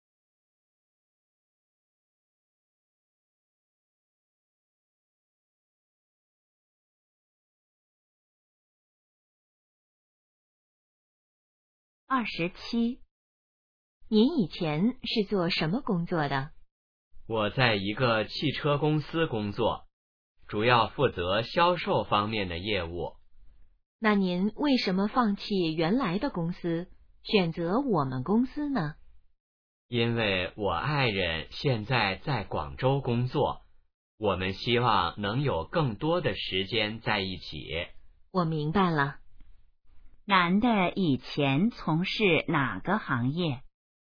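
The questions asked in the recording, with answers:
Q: 男的以前从事哪个行业?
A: 汽车销售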